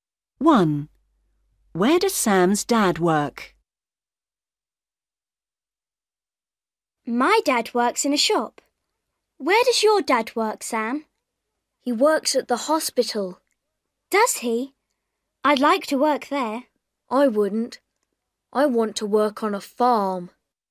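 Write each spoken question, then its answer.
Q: Where does Sam's dad work?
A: at the hospital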